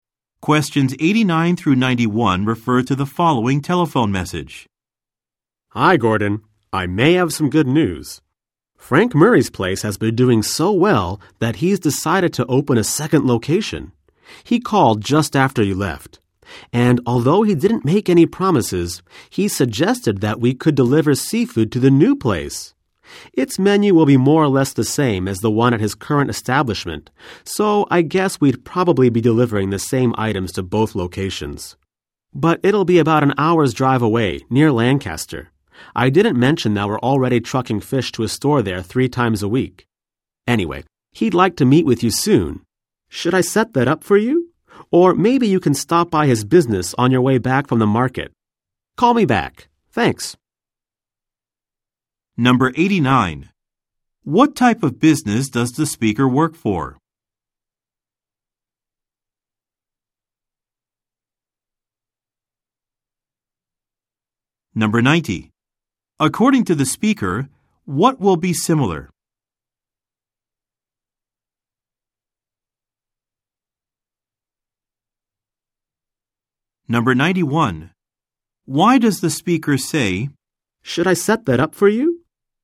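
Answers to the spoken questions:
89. A seafood supplier/delivery company
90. The menu of the new location
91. To offer to arrange a meeting with Frank Murray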